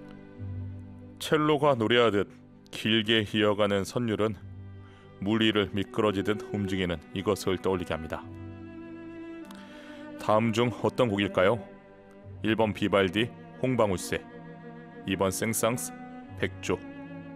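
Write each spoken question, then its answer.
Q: 다음 중 어떤 곡일까요?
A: 2: 생상스, 백조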